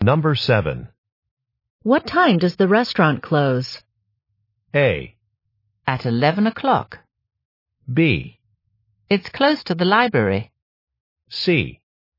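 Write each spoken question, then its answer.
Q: What time does the restaurant close?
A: A: At 11 o'clock.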